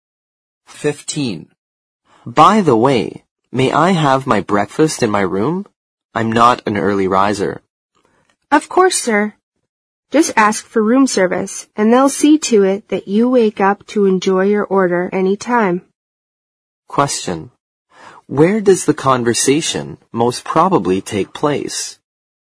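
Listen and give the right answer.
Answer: In a hotel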